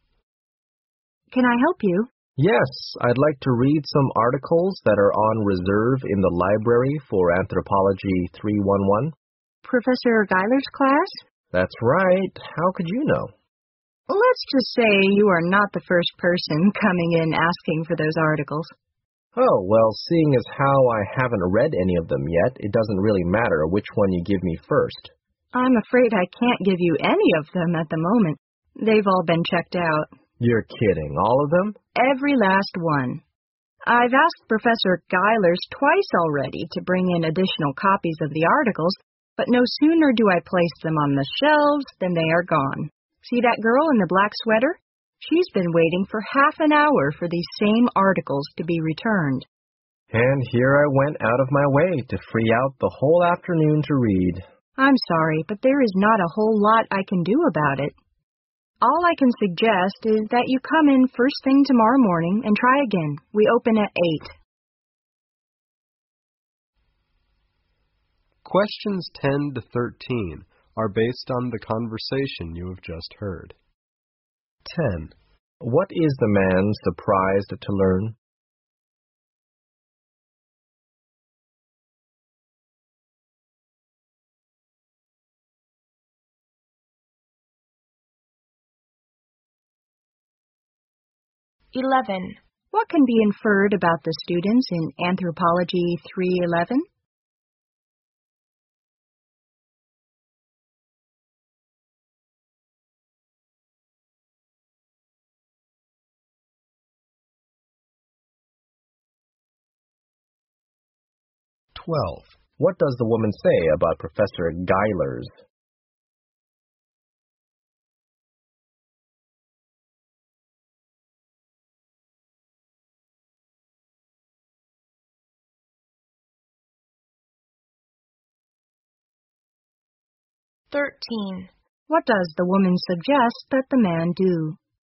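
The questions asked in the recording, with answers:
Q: What is the man surprised to learn?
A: All the reserved articles have been checked out

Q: What does the woman suggest that the man do?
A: Come back first thing tomorrow morning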